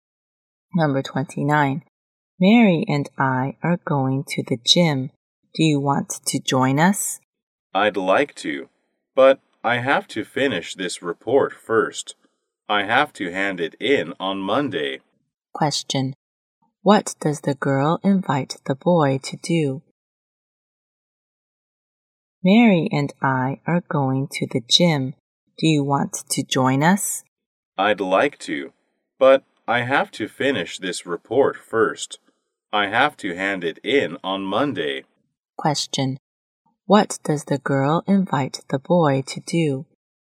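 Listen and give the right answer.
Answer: Go to the gym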